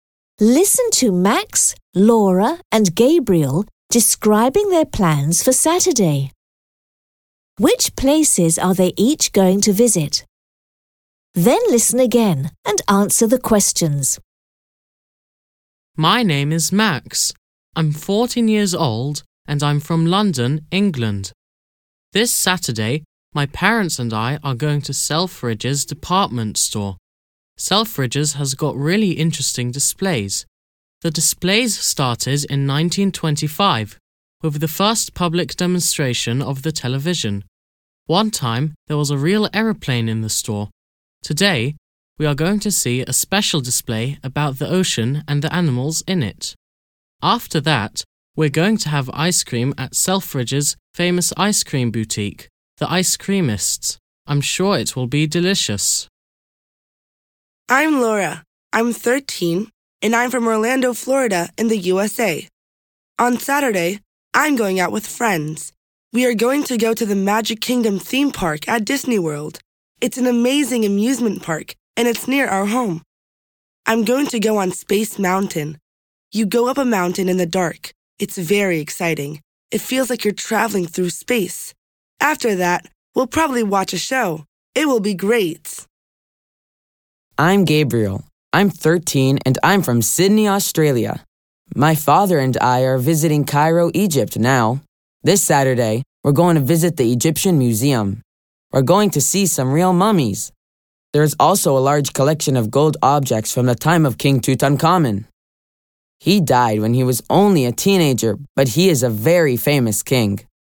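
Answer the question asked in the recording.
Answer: Max: Selfridges department store in London; Laura: the Magic Kingdom theme park at Disney World; Gabriel: the Egyptian Museum in Cairo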